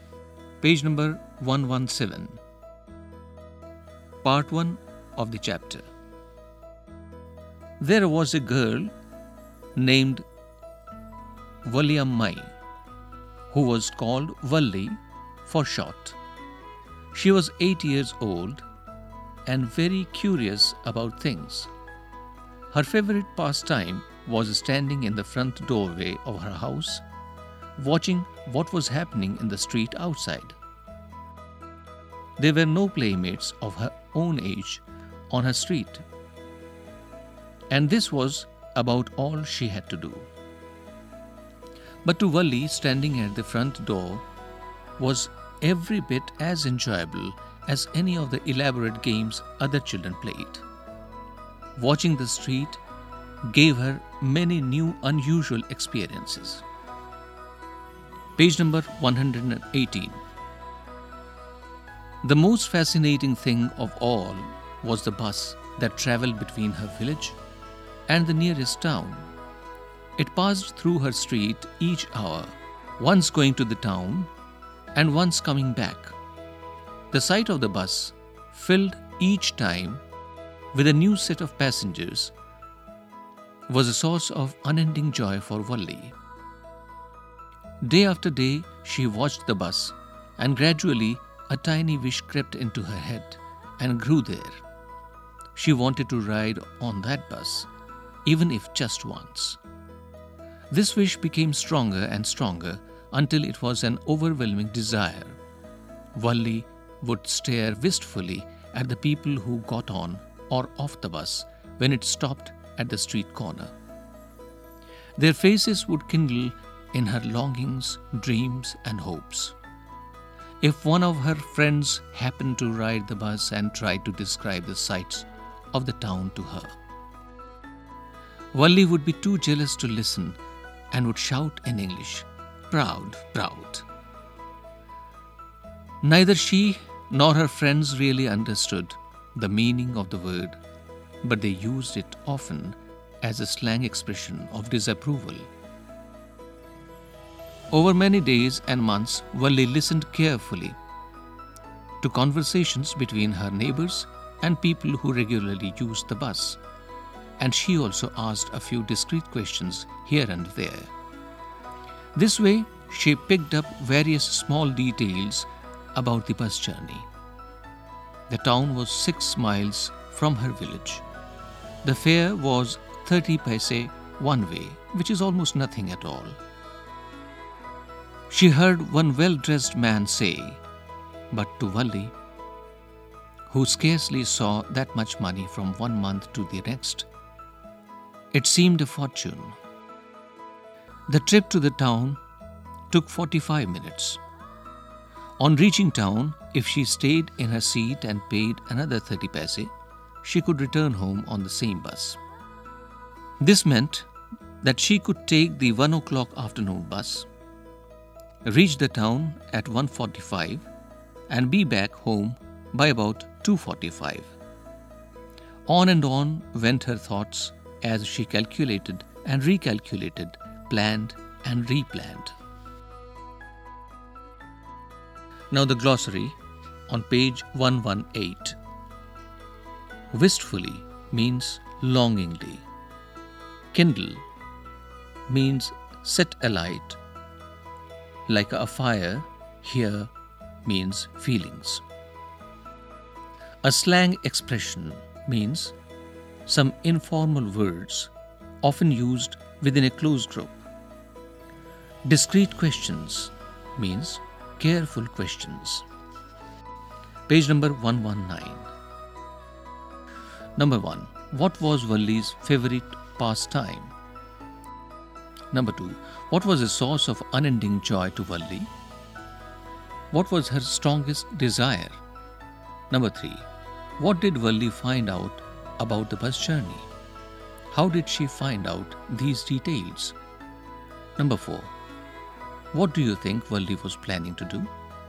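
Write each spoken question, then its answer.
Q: What was Valli's favorite pastime?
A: Standing in the front doorway of her house, watching the street outside

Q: What was a source of unending joy to Valli?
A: Seeing the bus go by, filled each time with a new set of passengers

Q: What was her strongest desire?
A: To ride on that bus, even just once

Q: What did Valli find out about the bus journey?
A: The town was 6 miles away, the fare was 30 paise each way, the trip took 45 minutes, and she could come back on the same bus

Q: How did she find out these details?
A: By listening to her neighbours and regular bus riders, and by asking a few careful questions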